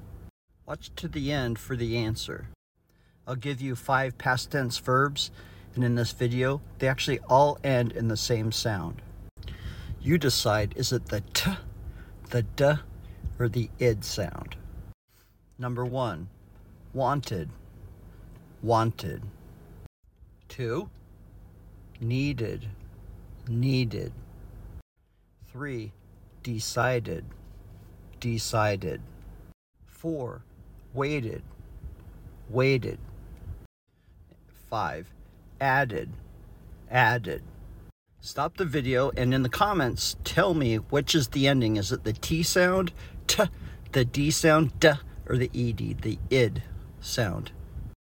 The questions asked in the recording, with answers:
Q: Is it the T sound, T, the D sound, D, or the ED, the ID sound?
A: It's the ID sound because these words ended in either T or D.